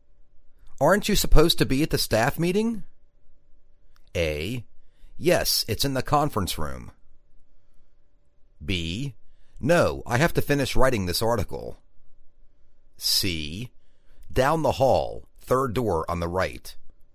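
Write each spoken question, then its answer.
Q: Aren't you supposed to be at the staff meeting?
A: B: No, I have to finish writing this article.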